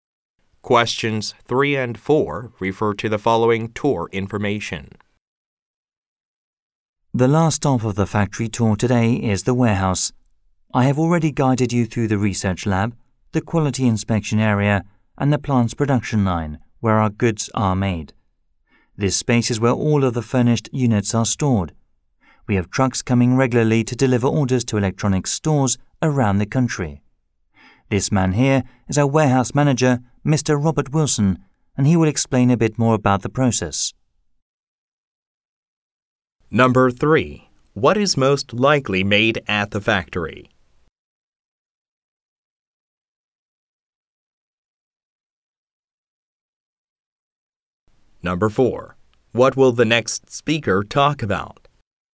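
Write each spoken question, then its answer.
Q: What is most likely made at the factory?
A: Electronics

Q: What will the next speaker talk about?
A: The warehouse storage and delivery process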